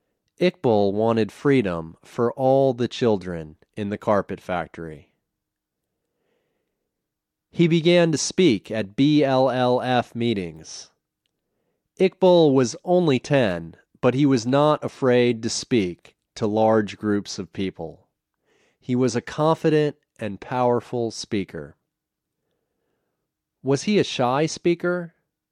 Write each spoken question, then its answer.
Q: Was he a shy speaker?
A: No, he wasn't a shy speaker.